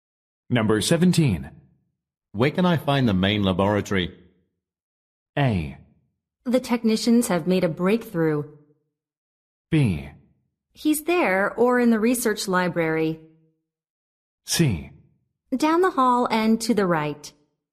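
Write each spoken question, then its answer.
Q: Where can I find the main laboratory?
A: C: Down the hall and to the right.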